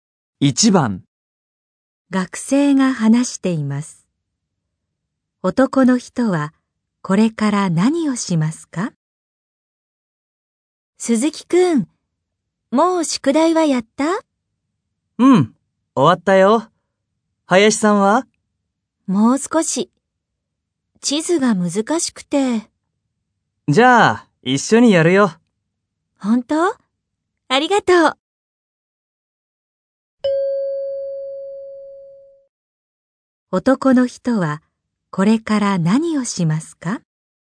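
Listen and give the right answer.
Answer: 林さんと一緒に宿題(地図)をやる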